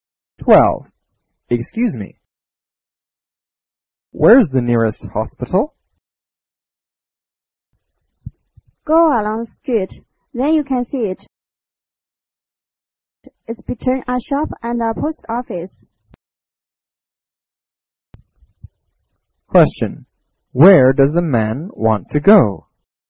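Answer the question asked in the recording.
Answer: The nearest hospital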